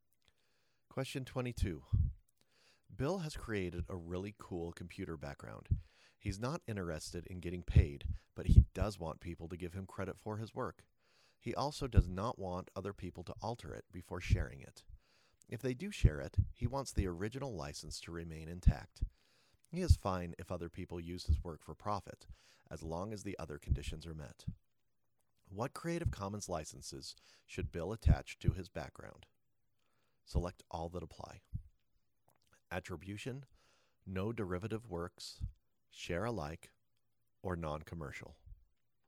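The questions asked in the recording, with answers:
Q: What Creative Commons licenses should Bill attach to his background?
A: Attribution, no derivative works, share alike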